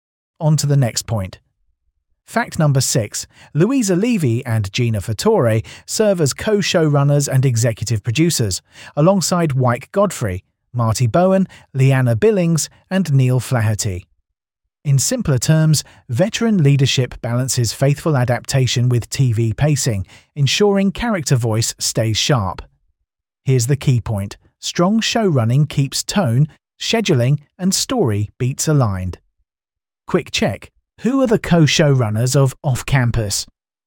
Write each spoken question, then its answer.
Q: Who are the co-showrunners of Off Campus?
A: Louisa Levy and Gina Fattore.